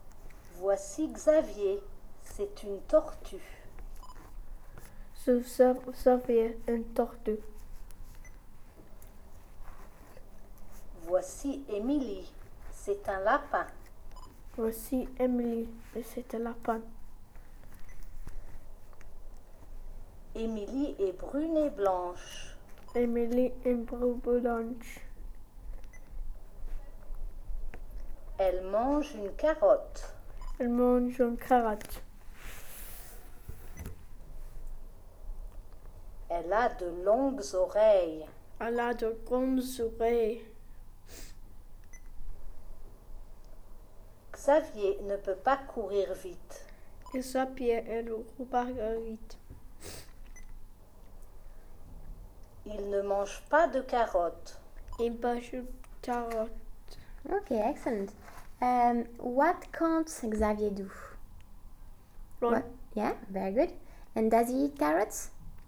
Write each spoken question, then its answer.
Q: What can't Xavier do?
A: Run.

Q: And does he eat carrots?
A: No.